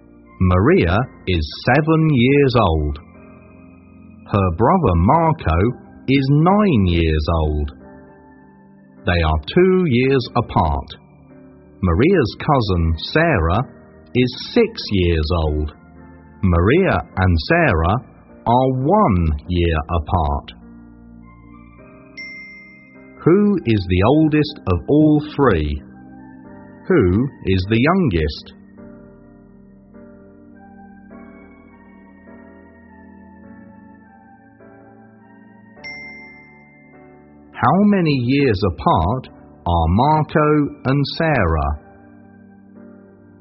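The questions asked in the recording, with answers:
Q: Who is the oldest of all three?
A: Marco

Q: Who is the youngest?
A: Sarah

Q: How many years apart are Marco and Sarah?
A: 3 years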